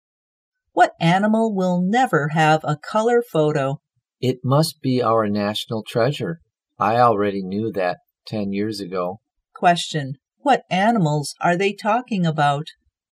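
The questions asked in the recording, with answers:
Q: What animals are they talking about?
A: Pandas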